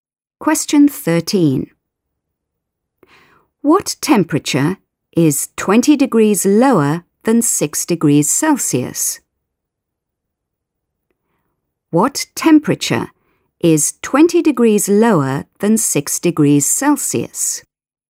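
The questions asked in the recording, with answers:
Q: What temperature is 20 degrees lower than 6 degrees Celsius?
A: -14°C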